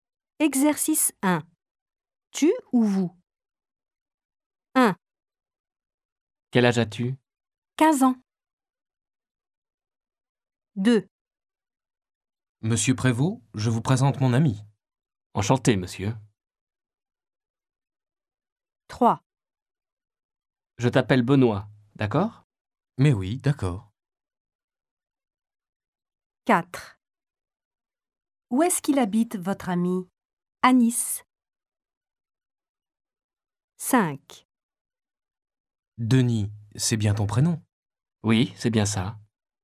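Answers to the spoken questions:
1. tu
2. vous
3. tu
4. vous
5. tu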